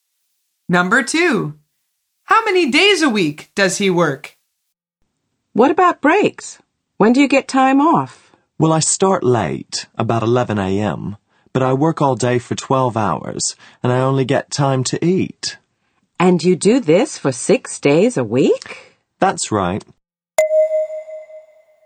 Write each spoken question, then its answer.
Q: How many days a week does he work?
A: The answer is 6.